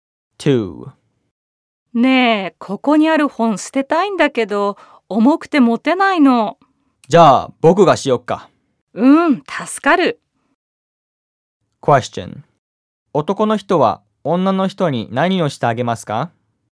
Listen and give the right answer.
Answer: 男の人は女の人の本を捨ててあげます。